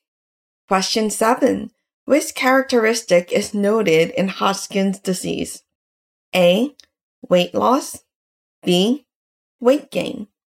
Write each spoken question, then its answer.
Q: Which characteristic is noted in Hodgkin's disease?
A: The correct answer is A, weight loss.